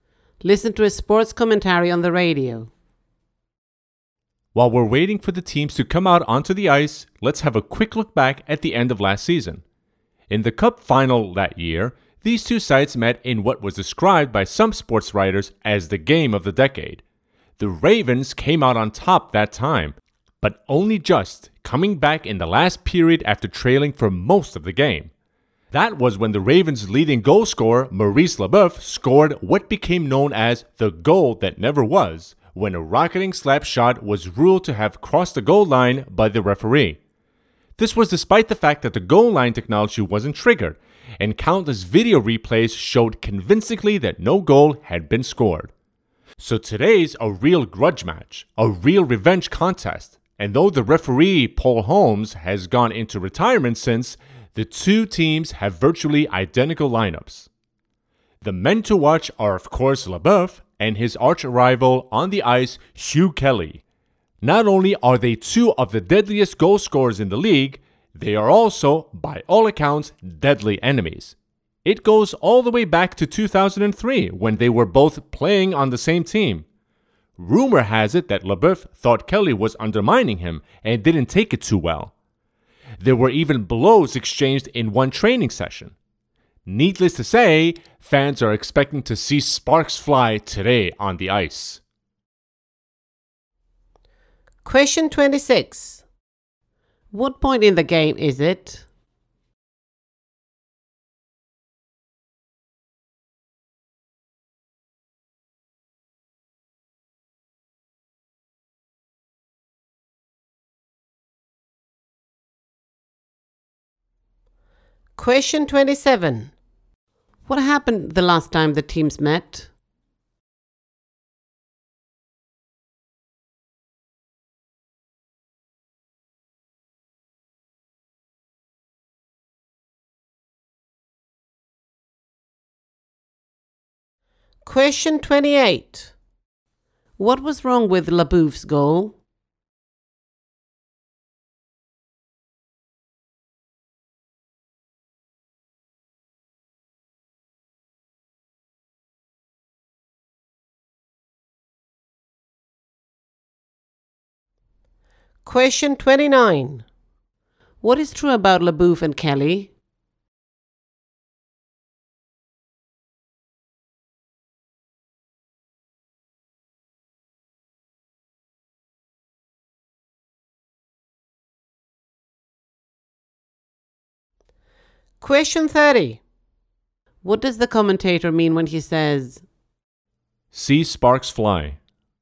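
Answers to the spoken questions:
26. Before the game starts, while waiting for the teams to come onto the ice
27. The Ravens came back in the last period to win the Cup final
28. The shot didn't actually cross the goal line, so no goal was scored
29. They are top goal scorers and enemies who used to play on the same team
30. He expects conflict or fighting between the players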